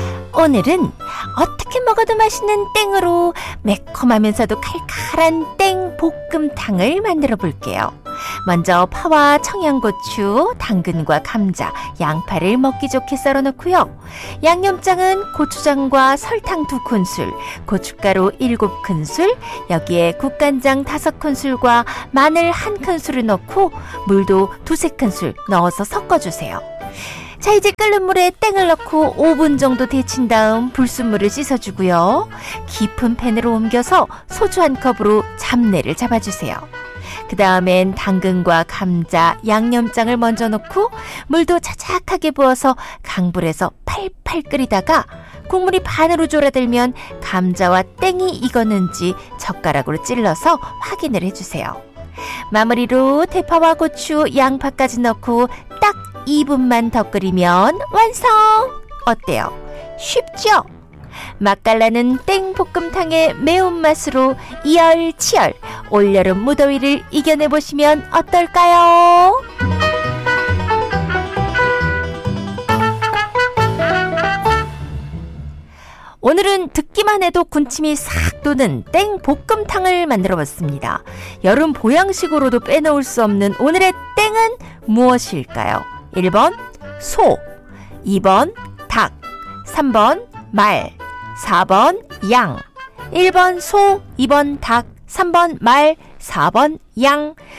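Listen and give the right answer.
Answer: 2: 닭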